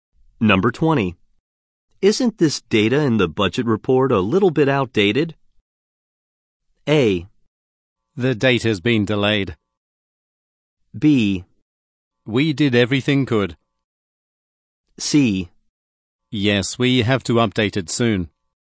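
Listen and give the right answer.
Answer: C: Yes, we have to update it soon.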